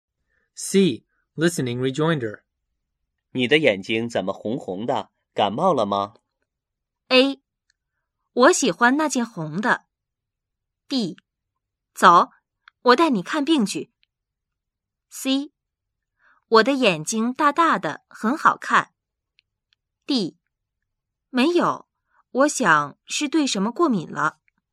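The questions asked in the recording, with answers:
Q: 你的眼睛怎么红红的?感冒了吗?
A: D: 没有,我想是对什么过敏了。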